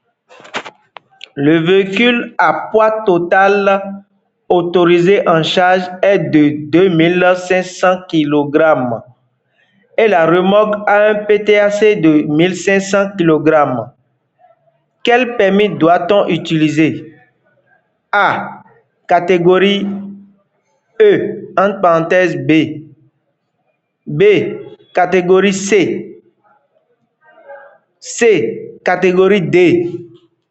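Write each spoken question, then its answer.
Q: Quel permis doit-on utiliser?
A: A: Catégorie E, entre parenthèses B.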